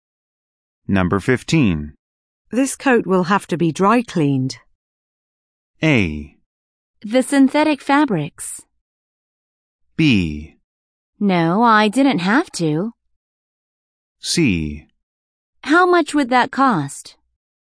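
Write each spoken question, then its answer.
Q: This coat will have to be dry cleaned.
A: C: How much would that cost?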